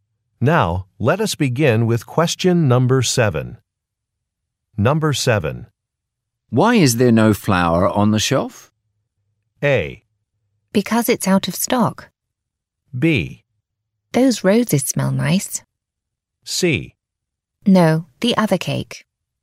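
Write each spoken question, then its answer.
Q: Why is there no flour on the shelf?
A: A: Because it's out of stock.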